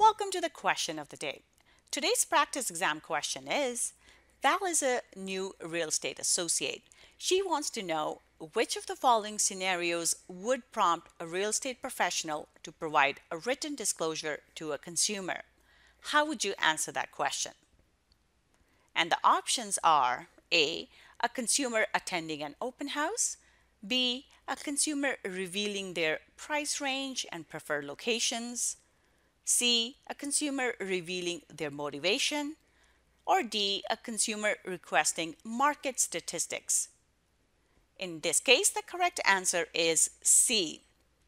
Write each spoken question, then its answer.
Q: Val is a new real estate associate she wants to know which of the following scenarios would prompt a real estate professional to provide a written disclosure to a consumer?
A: the correct answer is C.